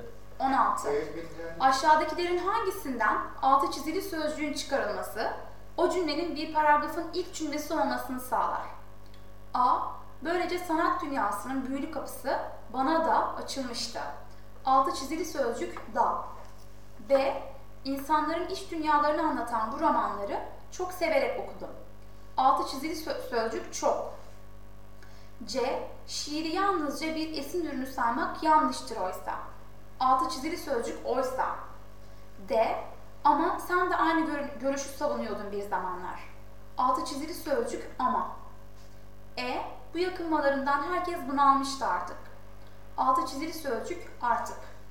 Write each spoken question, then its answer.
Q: Aşağıdakilerin hangisinden altı çizili sözcüğün çıkarılması, o cümlenin bir paragrafın ilk cümlesi olmasını sağlar?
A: Doğru yanıt C.